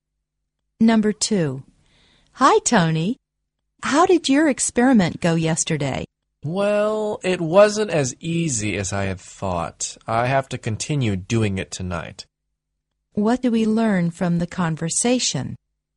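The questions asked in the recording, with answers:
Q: What do we learn from the conversation?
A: Tony hasn't finished his experiment and will continue it tonight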